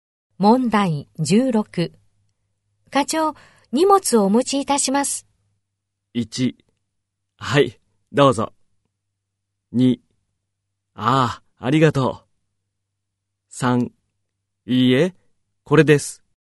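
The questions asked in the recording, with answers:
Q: 課長、荷物をお持ちいたします。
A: 3: ああ、ありがとう。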